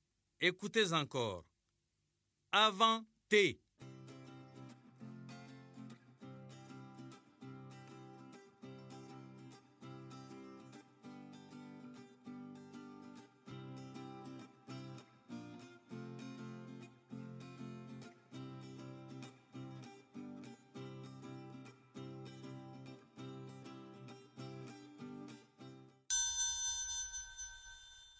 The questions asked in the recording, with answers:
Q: Avant T.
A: Bravo les élèves, j'espère que vous avez trouvé la lettre S.